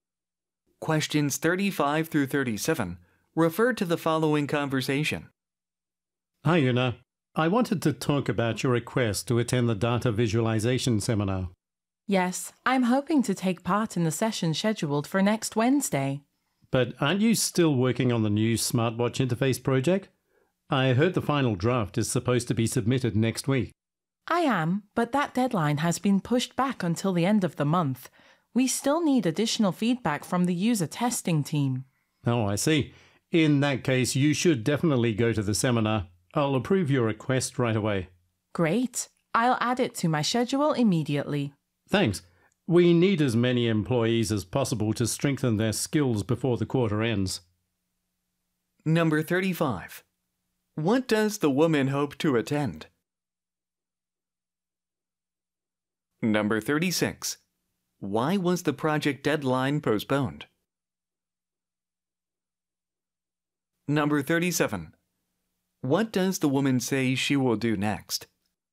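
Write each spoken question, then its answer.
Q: What does the woman hope to attend?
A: A data visualization seminar

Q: Why was the project deadline postponed?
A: More feedback is needed from the user testing team

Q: What does the woman say she will do next?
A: Add the seminar to her schedule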